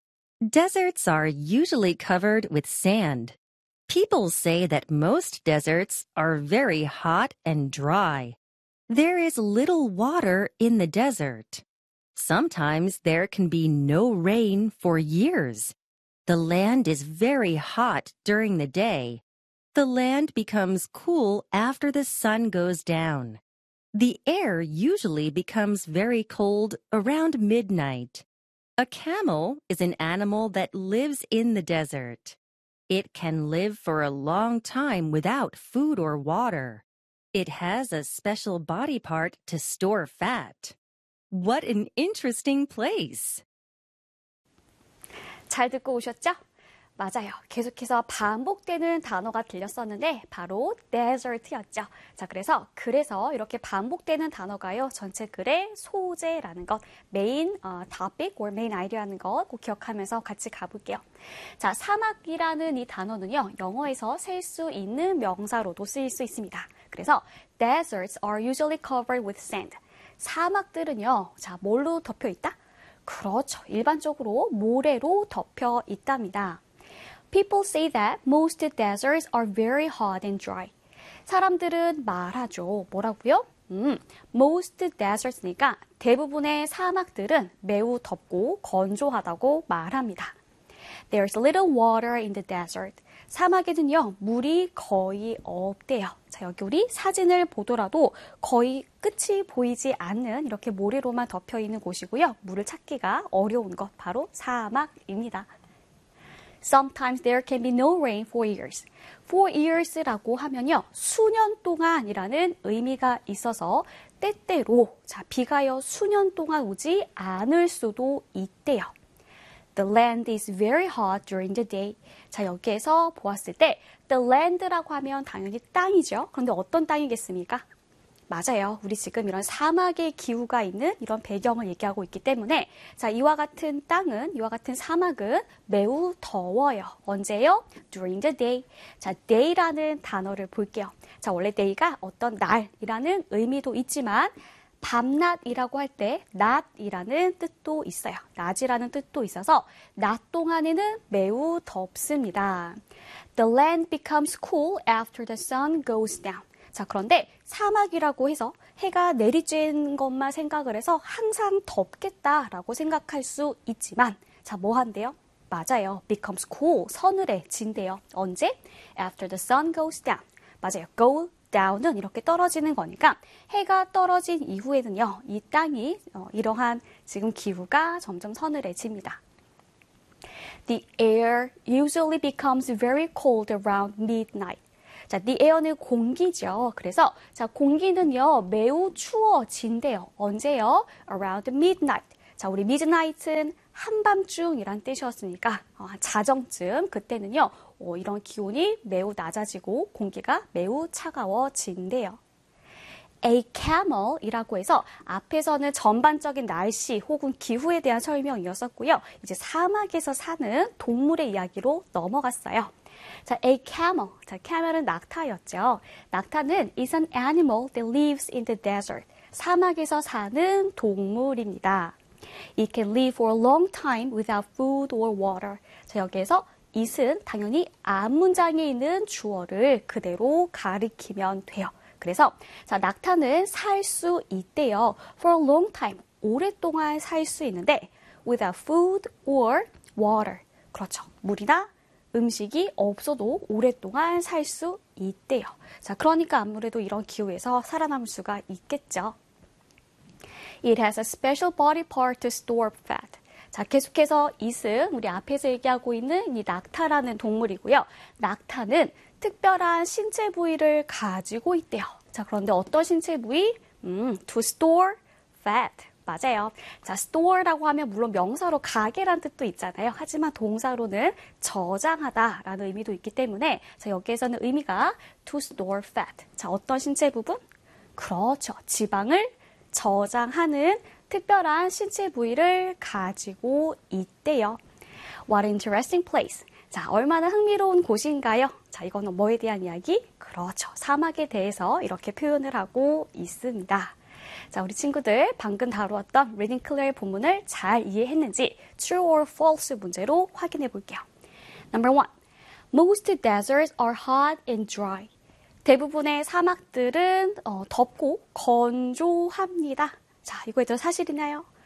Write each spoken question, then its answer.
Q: most deserts are hot and dry.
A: Obviously, the answer is true.